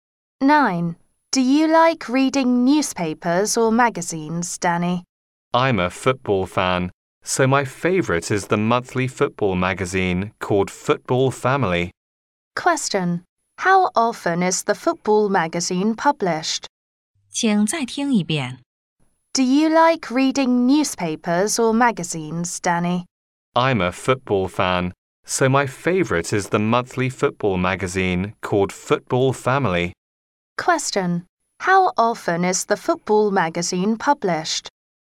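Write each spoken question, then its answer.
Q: How often is the football magazine published?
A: Monthly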